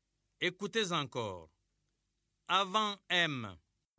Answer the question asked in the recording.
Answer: Bravo, les élèves. J'espère que vous avez trouvé la lettre L.